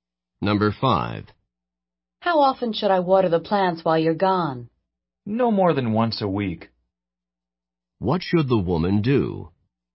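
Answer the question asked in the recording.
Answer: Water the plants once a week at most.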